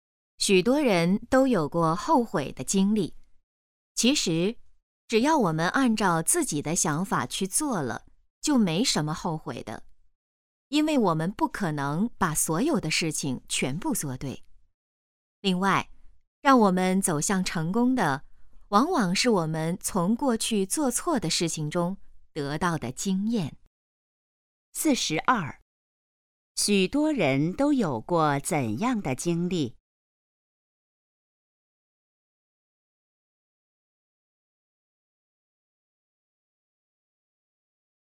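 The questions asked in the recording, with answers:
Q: 许多人都有过怎样的经历?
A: 后悔的经历

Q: 什么能帮助我们走向成功?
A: 从过去做错的事情中得到的经验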